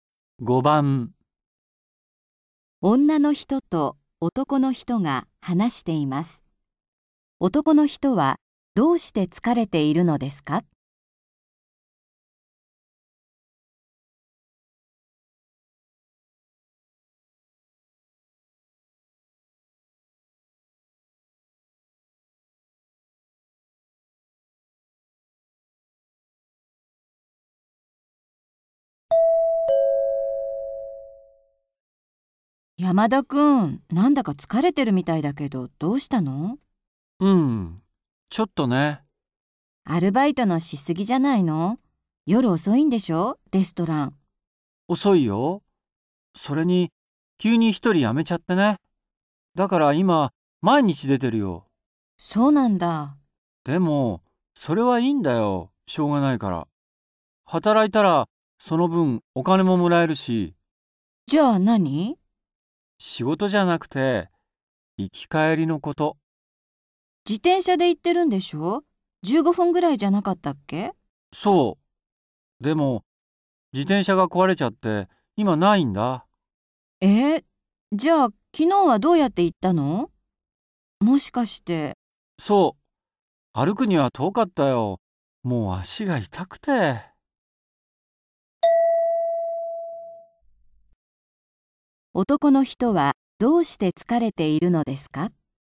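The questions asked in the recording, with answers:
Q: 男の人はどうして疲れているのですか?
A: 自転車が壊れて、アルバイトまで歩いて行ったから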